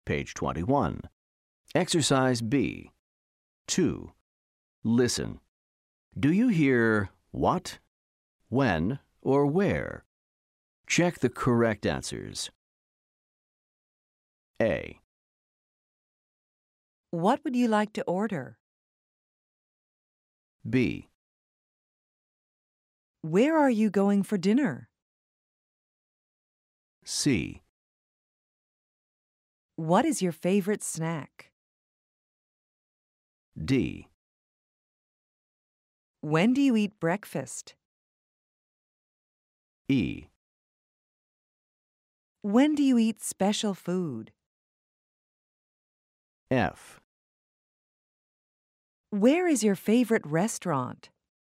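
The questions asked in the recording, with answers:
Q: What would you like to order?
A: what

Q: Where are you going for dinner?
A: where

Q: What is your favorite snack?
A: what

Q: When do you eat breakfast?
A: when

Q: When do you eat special food?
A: when

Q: Where is your favorite restaurant?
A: where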